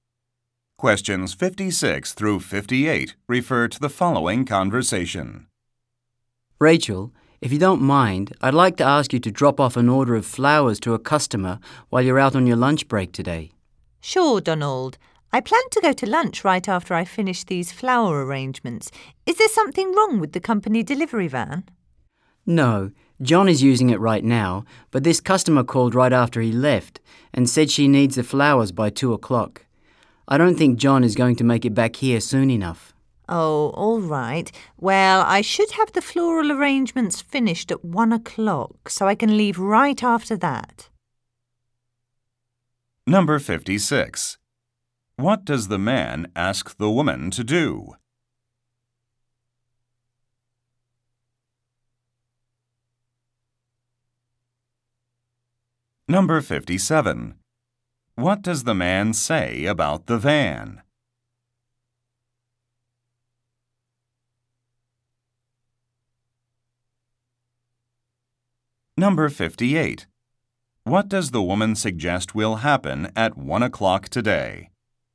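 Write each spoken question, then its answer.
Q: What does the man ask the woman to do?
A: Deliver flowers to a customer

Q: What does the man say about the van?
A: John is using it

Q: What does the woman suggest will happen at 1 o'clock today?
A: She will finish the flower arrangements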